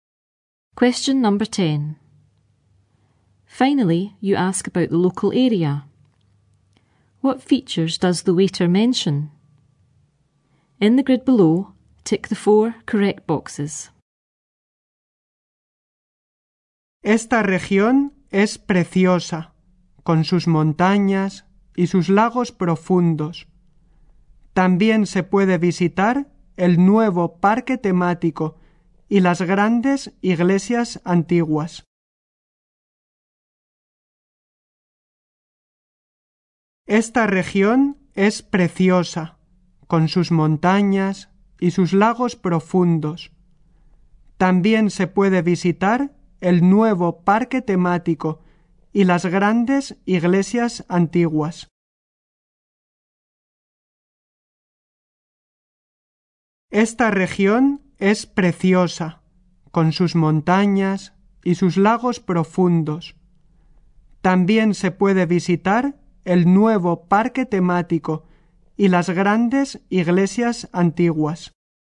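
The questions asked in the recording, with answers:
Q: What features does the waiter mention?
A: Mountains, deep lakes, a new theme park and big old churches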